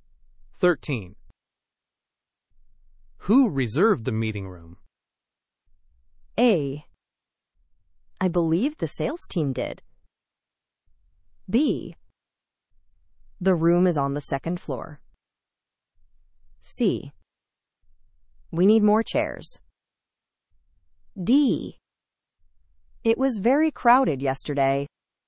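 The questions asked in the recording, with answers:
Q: Who reserved the meeting room?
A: A: I believe the sales team did.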